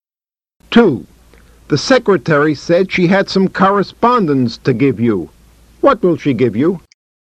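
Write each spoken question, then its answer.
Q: What will she give you?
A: Some correspondence (letters)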